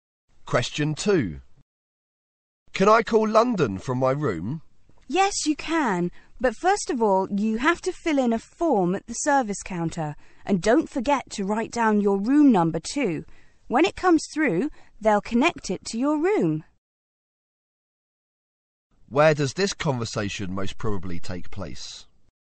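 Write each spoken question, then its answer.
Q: Where does this conversation most probably take place?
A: In a hotel.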